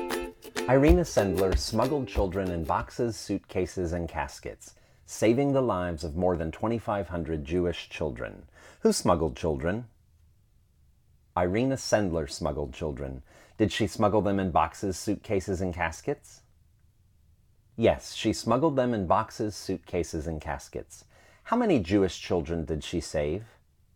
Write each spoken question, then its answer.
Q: Who smuggled children?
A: Irina Sendler smuggled children.

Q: How many Jewish children did she save?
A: She saved 2,500 Jewish children.